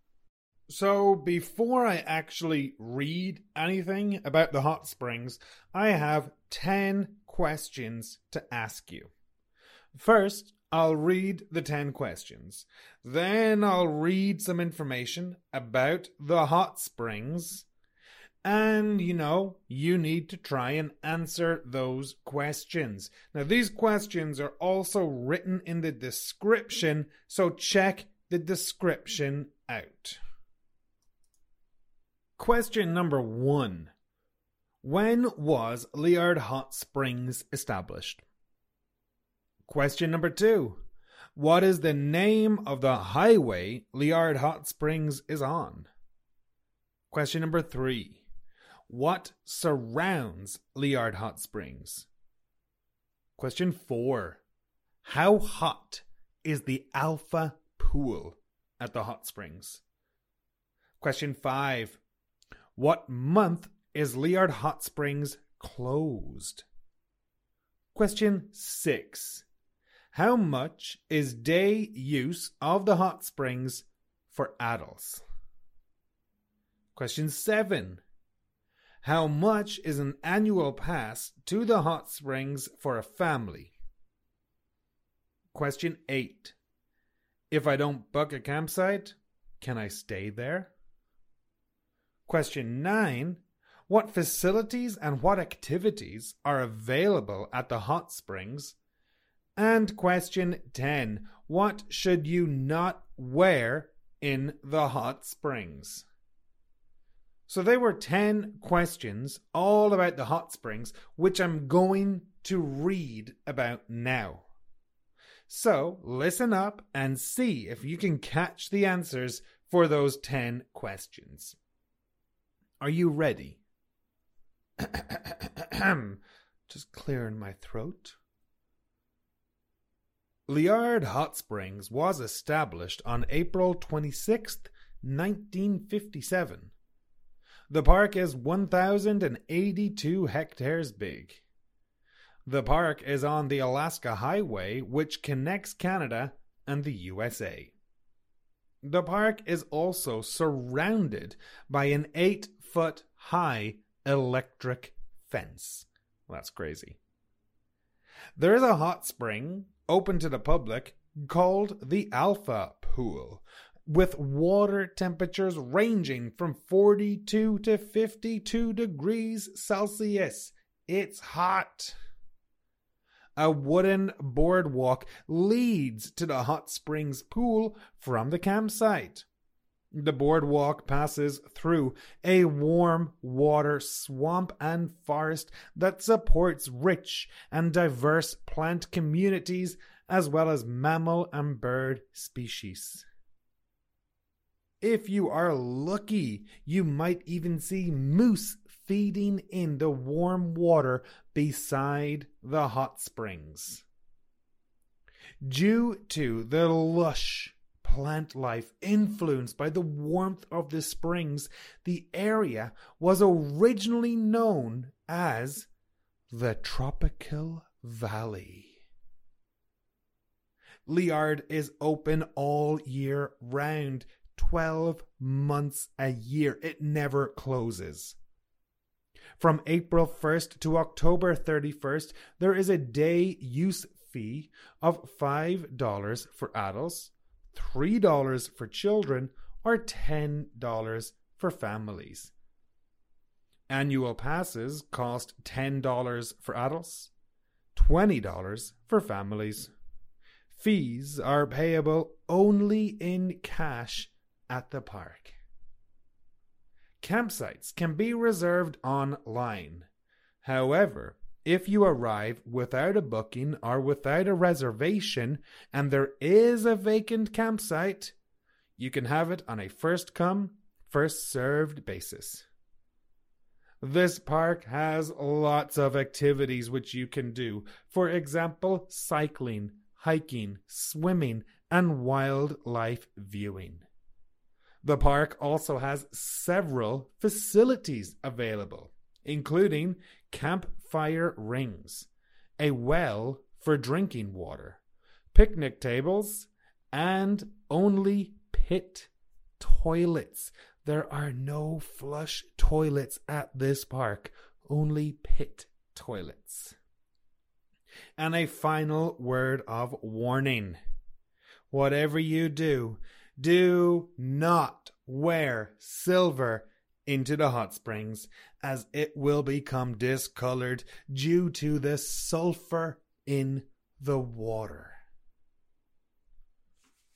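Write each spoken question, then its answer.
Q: When was Liard Hot Springs established?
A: April 26th, 1957

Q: what is the name of the highway Liard Hot Springs is on?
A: The Alaska Highway

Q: what surrounds Liard Hot Springs?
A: An 8-foot-high electric fence

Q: how hot is the Alpha Pool at the hot springs?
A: 42 to 52 degrees Celsius

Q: what month is Liard Hot Springs closed?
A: None; it is open all year round

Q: How much is an annual pass to the hot springs for a family?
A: $20

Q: If I don't book a campsite, can I stay there?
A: Yes, if a campsite is vacant, first come, first served

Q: What facilities and what activities are available at the hot springs?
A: Cycling, hiking, swimming, wildlife viewing; campfire rings, a well, picnic tables, pit toilets

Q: What should you not wear in the hot springs?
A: Silver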